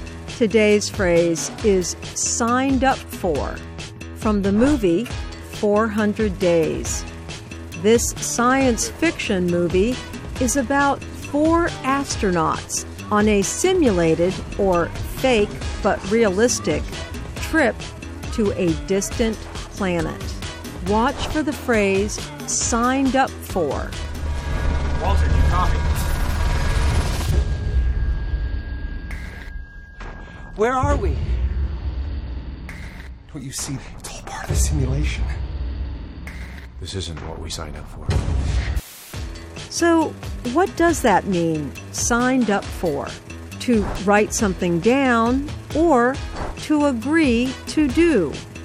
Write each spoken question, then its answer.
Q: So, what does that mean, signed up for?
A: Signed up for means something you agreed to do.